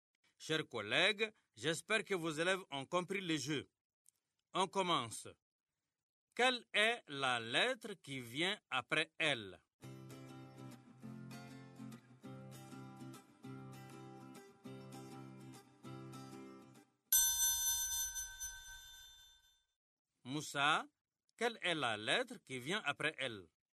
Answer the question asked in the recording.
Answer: Monsieur, c'est M.